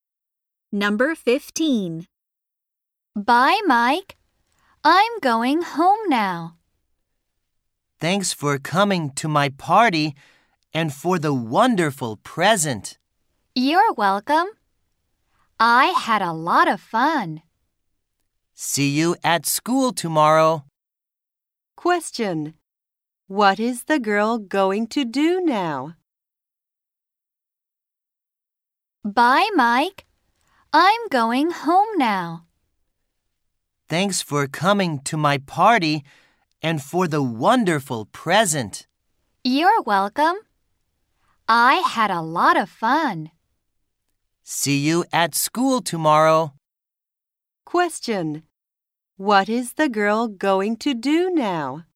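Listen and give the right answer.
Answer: Go home.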